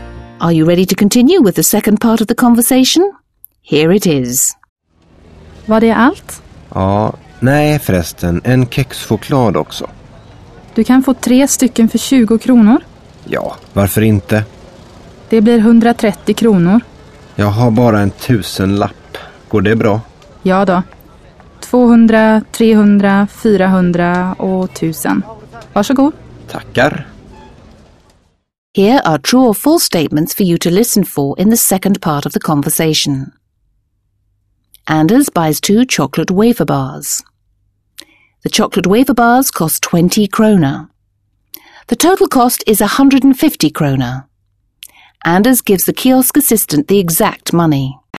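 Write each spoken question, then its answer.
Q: Anders buys 2 chocolate wafer bars.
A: False

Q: The total cost is 150 kroner.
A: False

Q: Anders gives the kiosk assistant the exact money.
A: False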